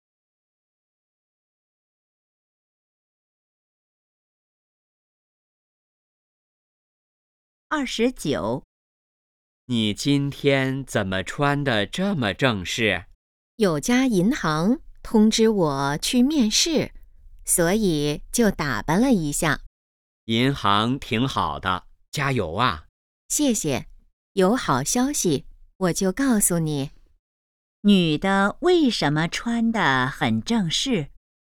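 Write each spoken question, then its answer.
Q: 女的为什么穿得很正式?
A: 去银行面试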